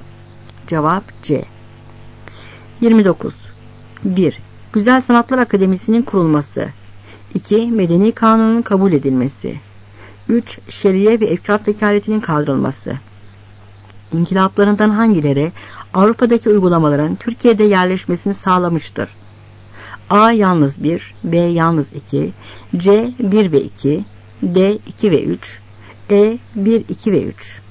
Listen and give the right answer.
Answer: Cevap C.